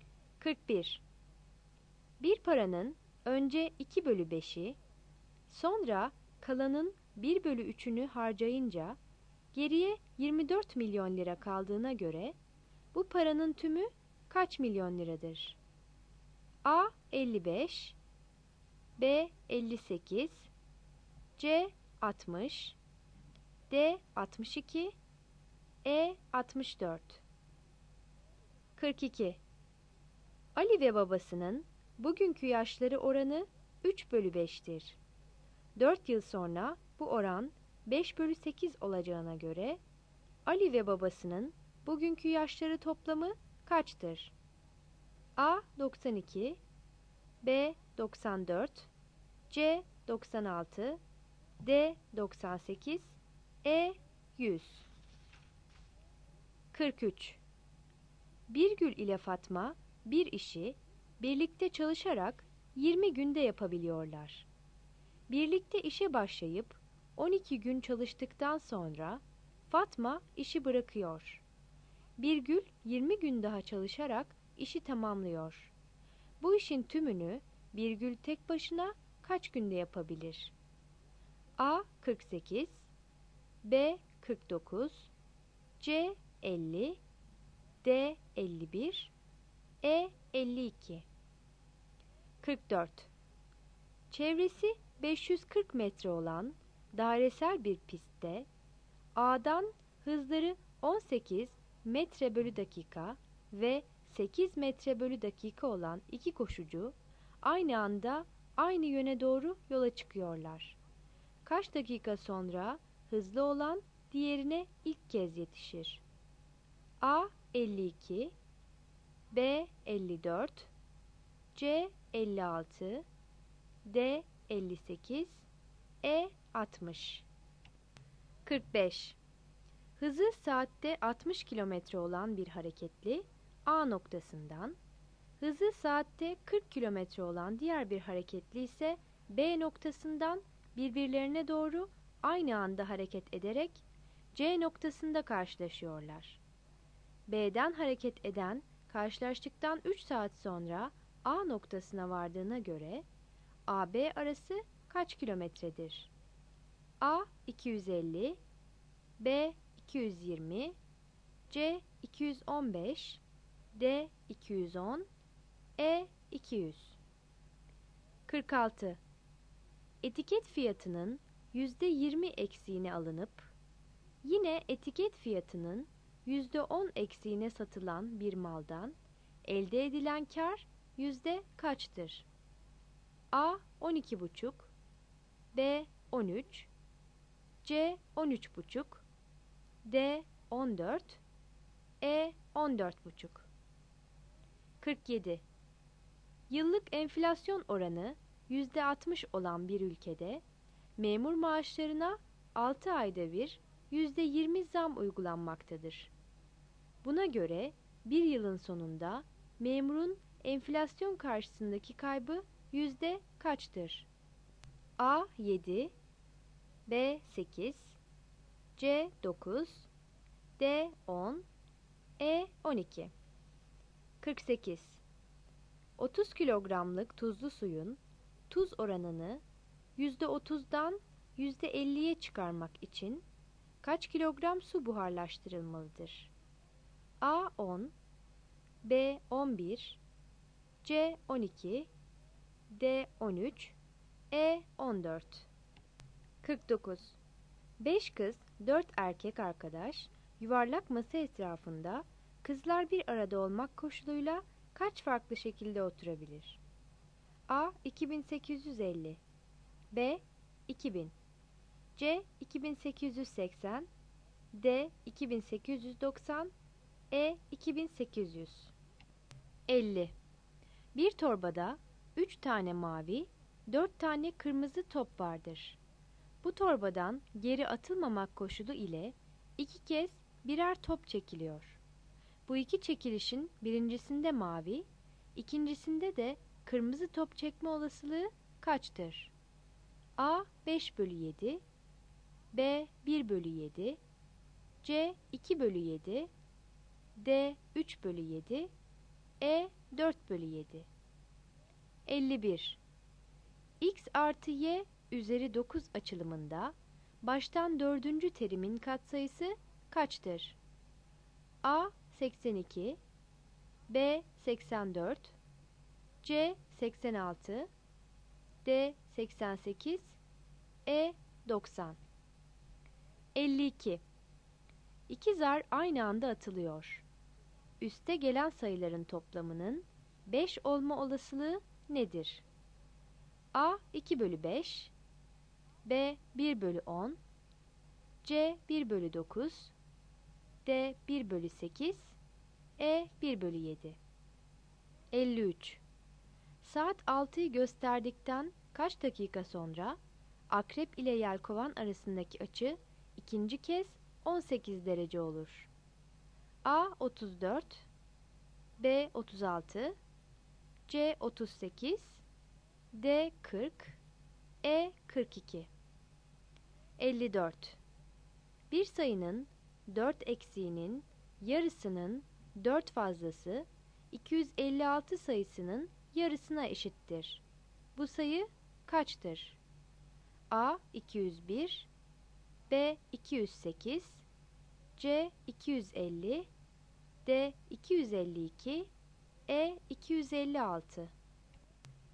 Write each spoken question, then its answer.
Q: Bir paranın önce 2 bölü 5'i, sonra kalanın 1 bölü 3'ünü harcayınca geriye 24 milyon lira kaldığına göre bu paranın tümü kaç milyon liradır?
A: 41 C

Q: 4 yıl sonra bu oran 5 bölü 8 olacağına göre Ali ve babasının bugünkü yaşları toplamı kaçtır?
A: 42 C

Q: Bu işin tümünü Bir Gül tek başına kaç günde yapabilir?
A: 43 C

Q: Kaç dakika sonra hızlı olan diğerine ilk kez yetişir?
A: 44 B

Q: B'den hareket eden karşılaştıktan 3 saat sonra A noktasına vardığına göre AB arası kaç kilometredir?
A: 45 E

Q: Etiket fiyatının %20 eksiğine alınıp yine etiket fiyatının %10 eksiğine satılan bir maldan elde edilen kar yüzde kaçtır?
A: 46 A

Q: 30 kilogramlık tuzlu suyun tuz oranını %30'dan %50'ye çıkarmak için kaç kilogram su buharlaştırılmalıdır?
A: 48 C

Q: 5 kız, 4 erkek arkadaş yuvarlak masa etrafında kızlar bir arada olmak koşuluyla kaç farklı şekilde oturabilir?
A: 49 C

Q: Bu iki çekilişin birincisinde mavi, ikincisinde de kırmızı top çekme olasılığı kaçtır?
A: 50 C

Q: X artı Y üzeri 9 açılımında baştan dördüncü terimin katsayısı kaçtır?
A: 51 B

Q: Üste gelen sayıların toplamının 5 olma olasılığı nedir?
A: 52 C

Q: Saat 6'yı gösterdikten kaç dakika sonra akrep ile yelkovan arasındaki açı ikinci kez 18 derece olur?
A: 53 B

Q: Bu sayı kaçtır?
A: 54 D